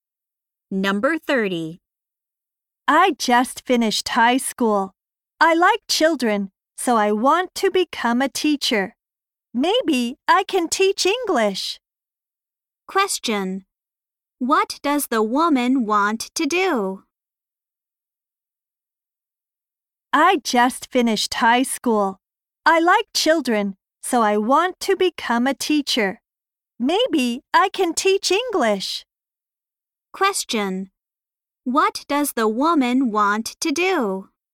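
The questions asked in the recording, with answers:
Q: What does the woman want to do?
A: Become a teacher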